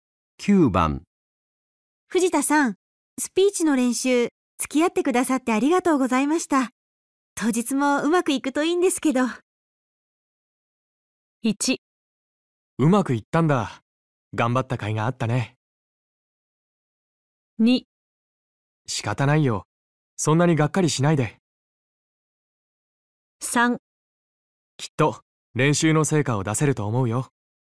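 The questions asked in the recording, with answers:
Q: 藤田さん、スピーチの練習、付き合ってくださってありがとうございました。当日もうまくいくといいんですけど。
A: 3: きっと練習の成果を出せると思うよ。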